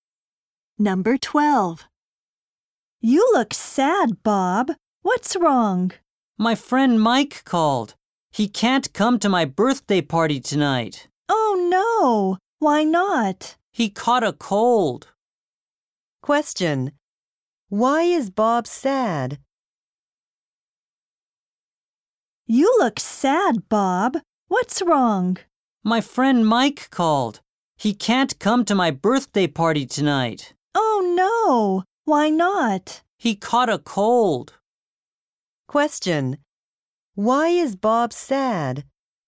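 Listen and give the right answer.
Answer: His friend Mike can't come to his birthday party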